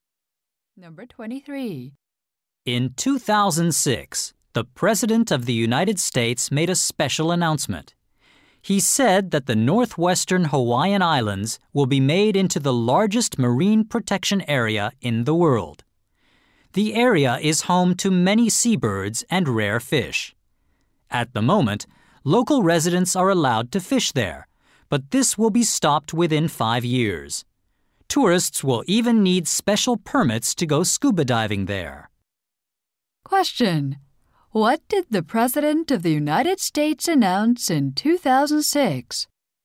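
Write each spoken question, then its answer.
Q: What did the President of the United States announce in 2006?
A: A huge marine protection area in the northwestern Hawaiian Islands.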